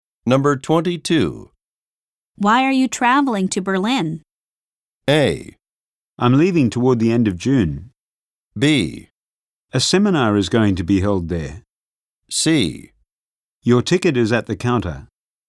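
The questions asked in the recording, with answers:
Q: Why are you traveling to Berlin?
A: B: A seminar is going to be held there.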